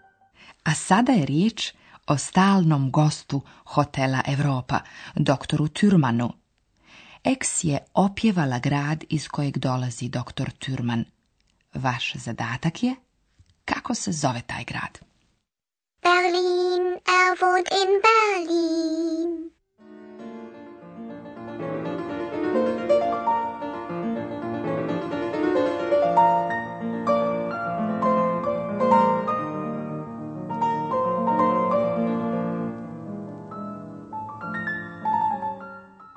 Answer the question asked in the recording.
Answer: Odgovor na naše naredno pitanje je Berlin.